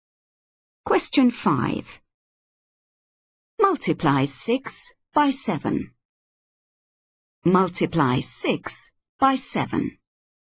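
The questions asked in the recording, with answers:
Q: Multiply 6 by 7.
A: 42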